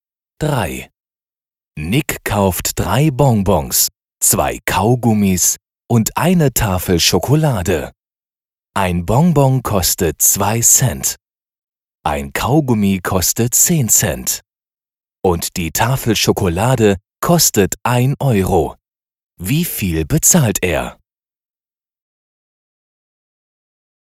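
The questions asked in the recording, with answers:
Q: Wie viel bezahlt er?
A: 1,26 Euro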